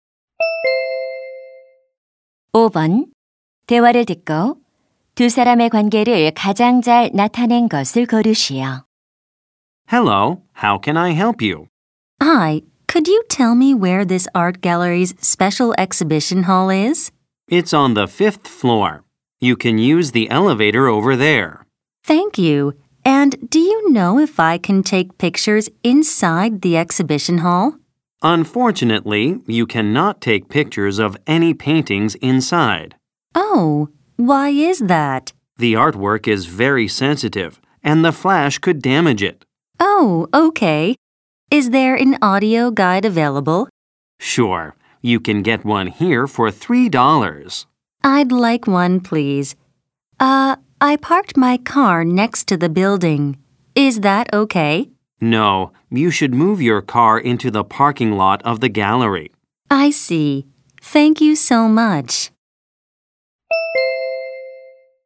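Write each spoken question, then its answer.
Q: 대화를 듣고 두 사람의 관계를 가장 잘 나타낸 것을 고르시오.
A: 미술관 직원 - 관람객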